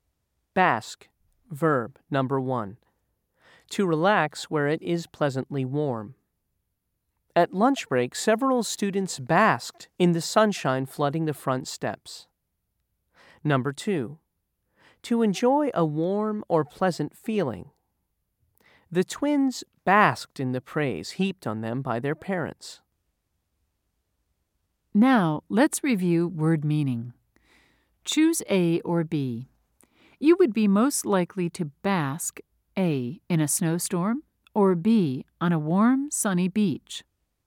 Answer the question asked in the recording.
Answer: If you said B, you were right.